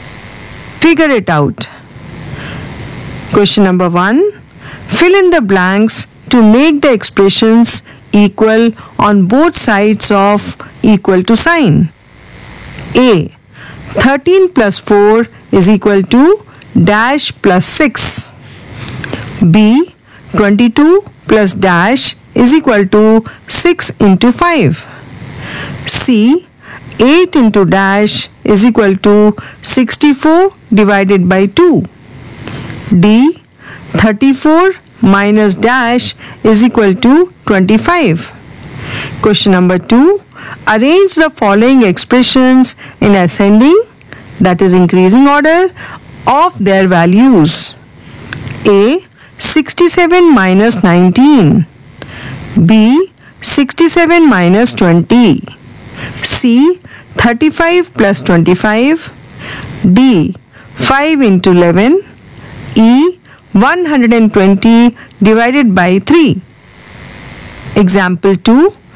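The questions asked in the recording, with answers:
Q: A. 13 plus 4 is equal to dash plus 6.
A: 11

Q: Arrange the following expressions in ascending, that is increasing order, of their values.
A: E (120 ÷ 3), B (67 − 20), A (67 − 19), D (5 × 11), C (35 + 25)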